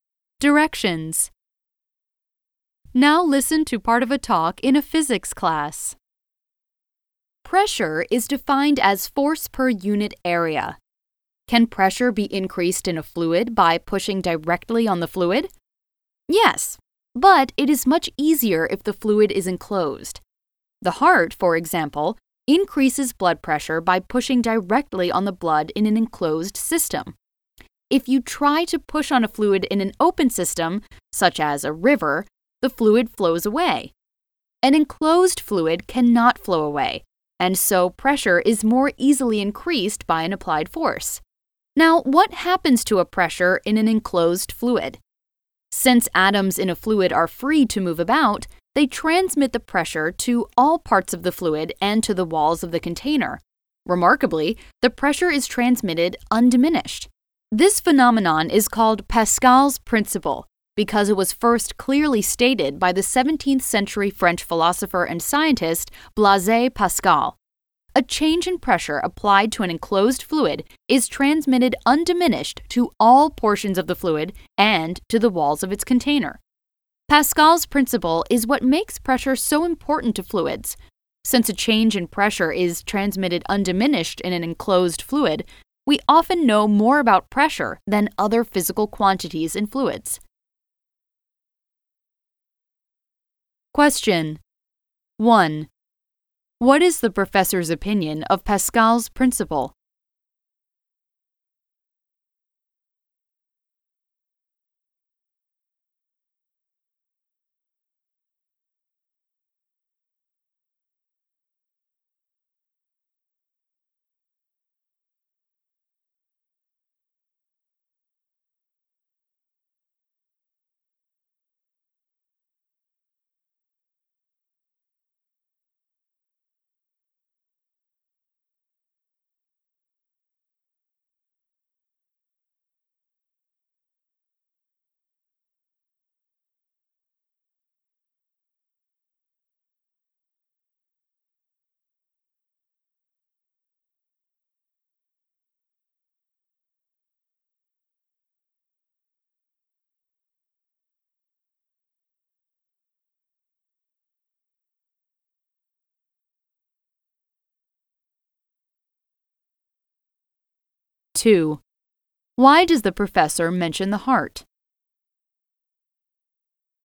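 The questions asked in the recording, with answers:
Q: Why does the professor mention the heart?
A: As an example of increasing pressure by pushing directly on a fluid in an enclosed system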